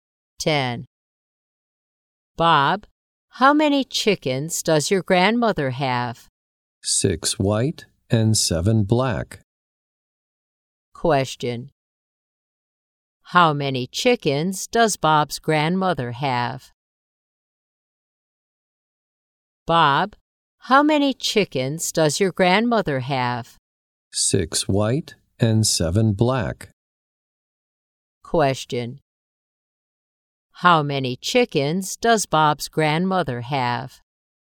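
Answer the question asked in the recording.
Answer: 13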